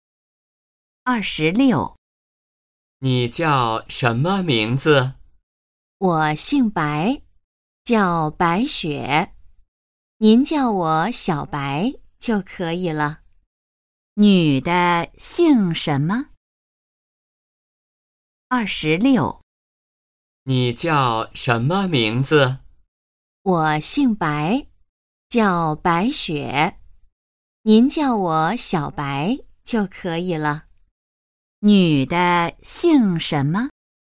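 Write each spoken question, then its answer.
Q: 女的姓什么?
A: 姓白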